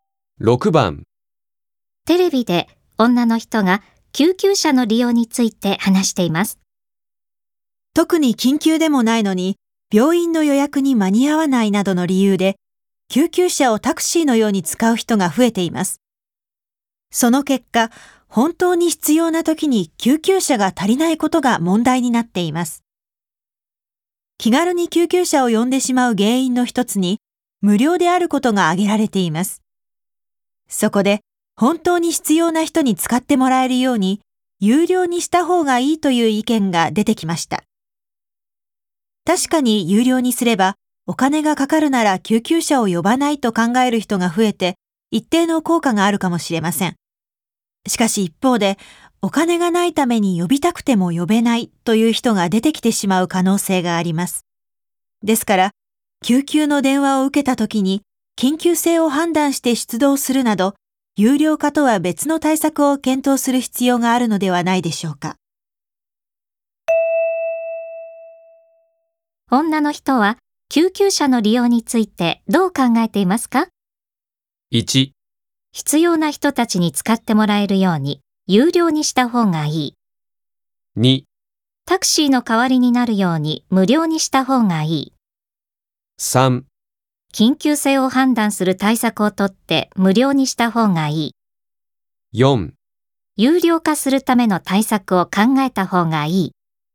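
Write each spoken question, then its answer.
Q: 女の人は救急車の利用についてどう考えていますか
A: 3: 緊急性を判断する対策をとって無料にした方がいい。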